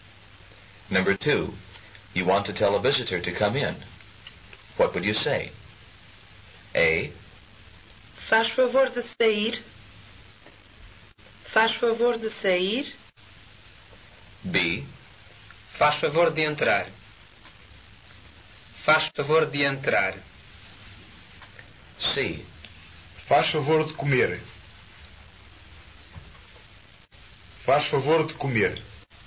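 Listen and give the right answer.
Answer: B: Faz favor de entrar.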